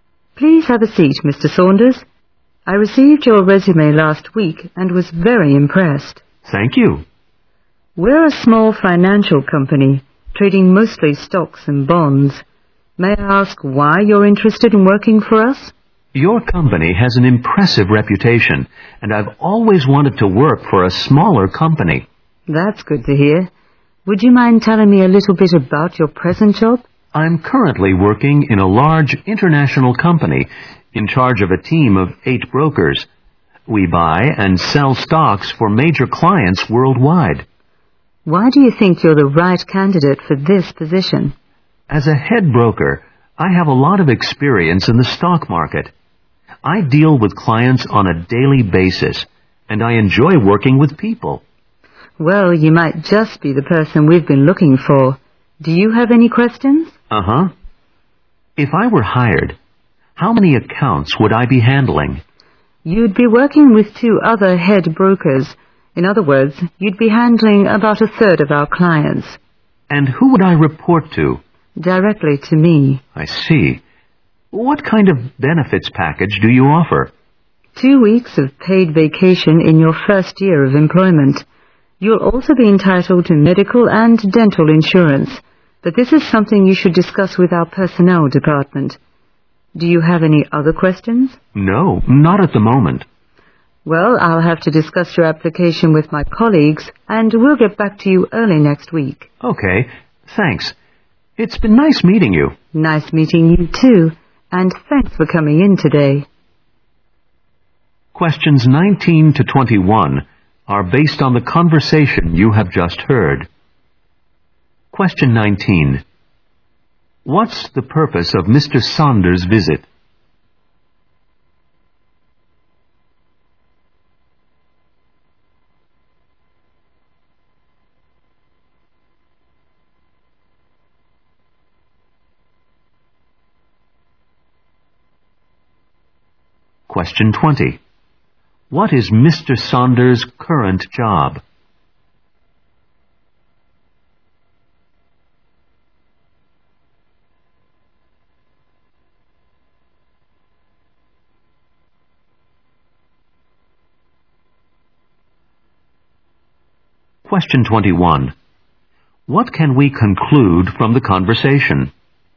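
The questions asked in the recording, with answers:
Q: What's the purpose of Mr.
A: To apply for a job (job interview).

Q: What is Mr. Saunders' current job?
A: Head broker leading a team of 8 brokers.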